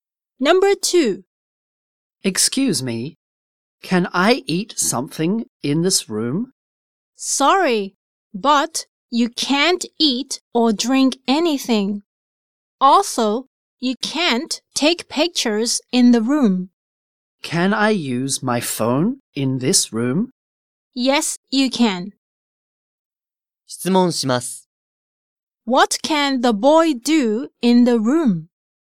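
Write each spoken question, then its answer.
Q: What can the boy do in the room?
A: He can use his phone.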